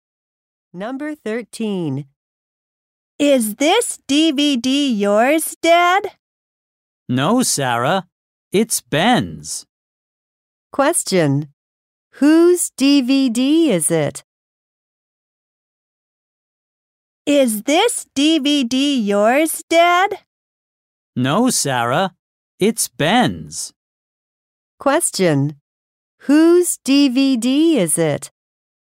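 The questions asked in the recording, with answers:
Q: Question: Whose DVD is it?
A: Ben's.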